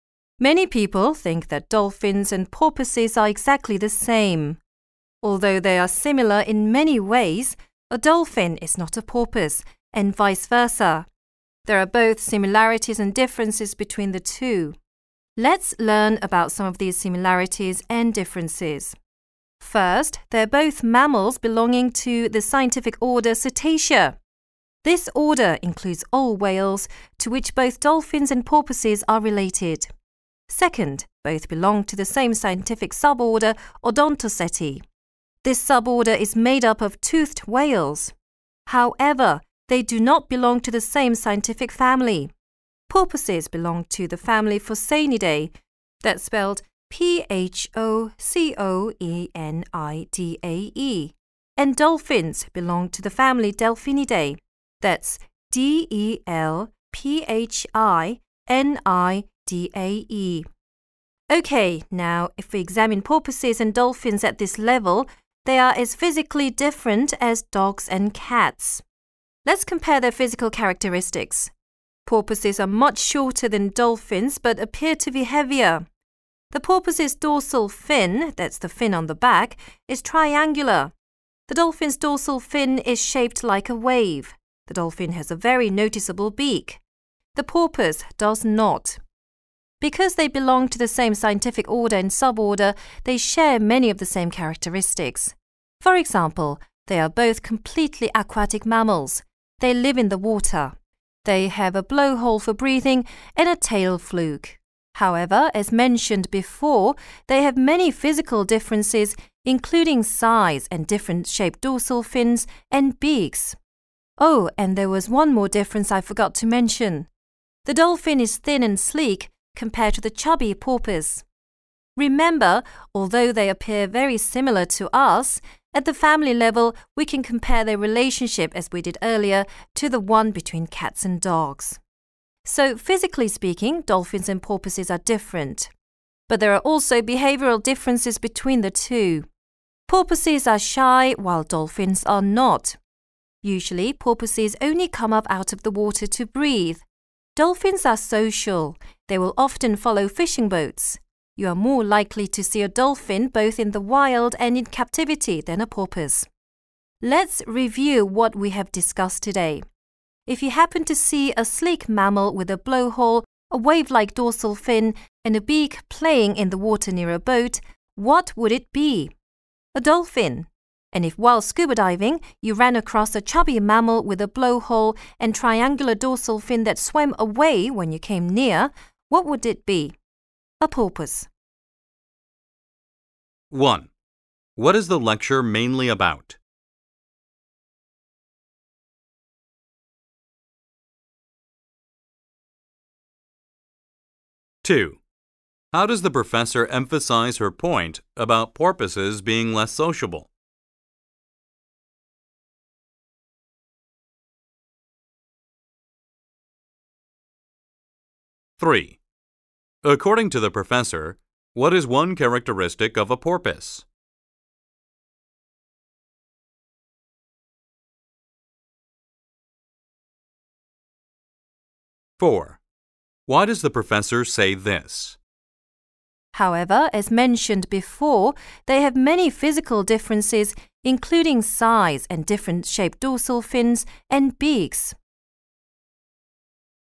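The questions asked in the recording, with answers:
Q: What is the lecture mainly about?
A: The similarities and differences between dolphins and porpoises

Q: According to the professor, what is one characteristic of a porpoise?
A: It has a triangular dorsal fin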